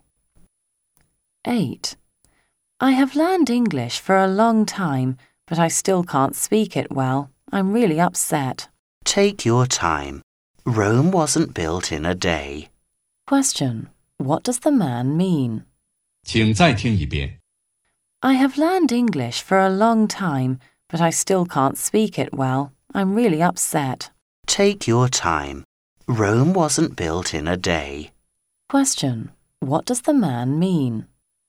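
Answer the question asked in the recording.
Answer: Be patient; learning to speak English well takes time.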